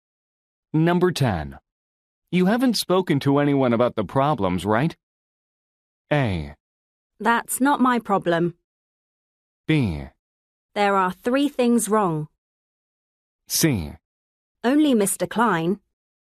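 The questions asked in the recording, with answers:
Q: You haven't spoken to anyone about the problems, right?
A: C: Only Mr. Klein.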